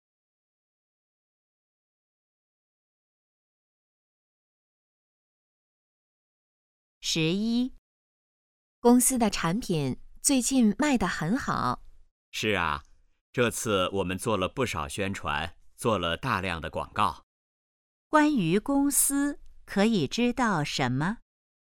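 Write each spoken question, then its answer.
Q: 关于公司,可以知道什么?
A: 做了大量的广告,产品卖得很好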